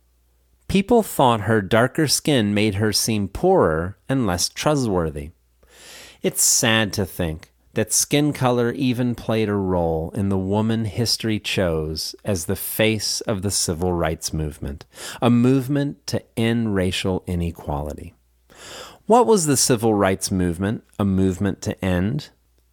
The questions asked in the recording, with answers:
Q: What was the civil rights movement a movement to end?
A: The civil rights movement was a movement to end racial inequality.